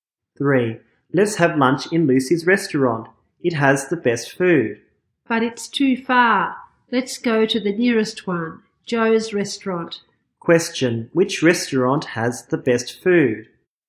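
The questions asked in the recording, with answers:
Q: Question, which restaurant has the best food?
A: Lucy's restaurant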